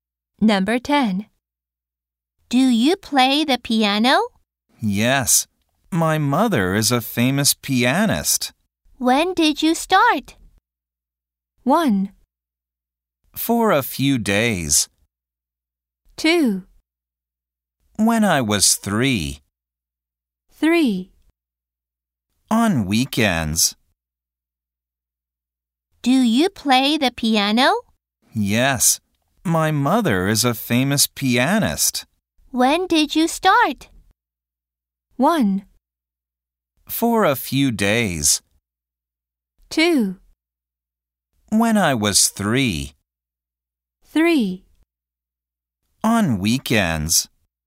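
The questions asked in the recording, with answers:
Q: When did you start?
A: 2: When I was 3.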